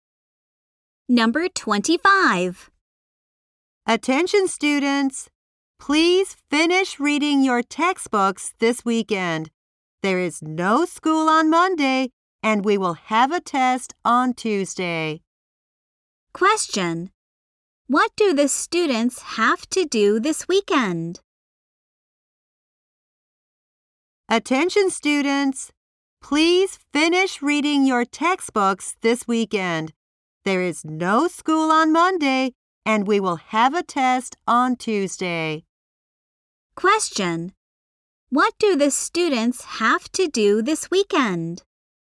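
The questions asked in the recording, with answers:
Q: What do the students have to do this weekend?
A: Finish reading their textbooks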